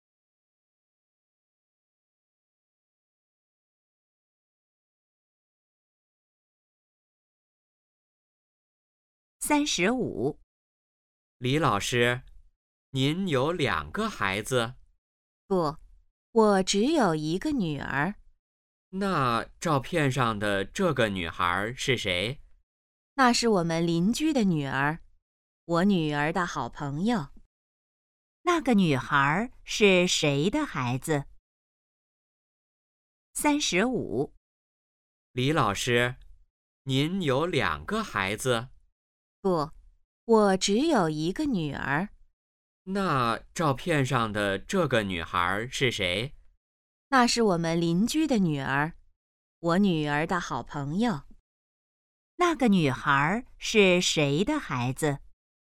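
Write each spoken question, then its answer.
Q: 那个女孩是谁的孩子?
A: 邻居的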